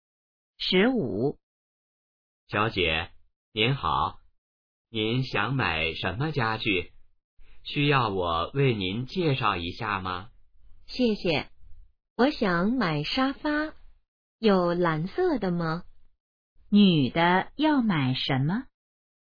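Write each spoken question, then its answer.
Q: 女的要买什么?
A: 沙发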